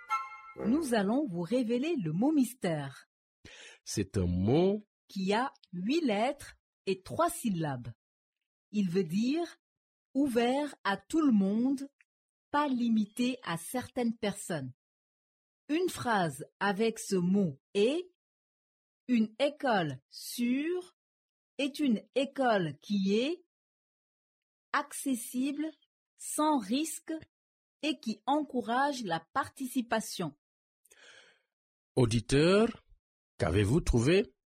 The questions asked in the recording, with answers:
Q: Auditeur, qu'avez-vous trouvé?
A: Le mot mystère d'aujourd'hui est inclusif.